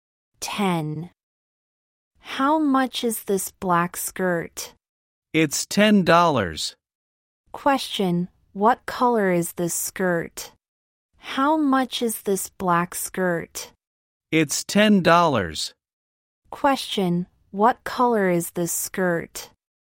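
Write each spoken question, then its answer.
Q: Question, what color is this skirt?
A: Black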